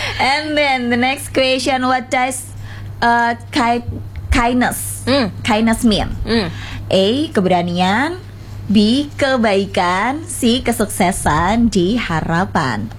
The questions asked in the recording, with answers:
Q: What does kindness kindness mean?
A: Kebaikan. Yes.